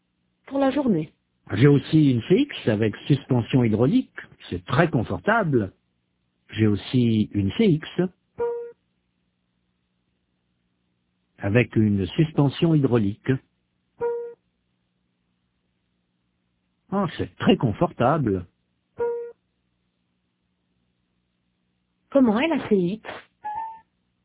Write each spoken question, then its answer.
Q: Comment est la CX?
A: Très confortable.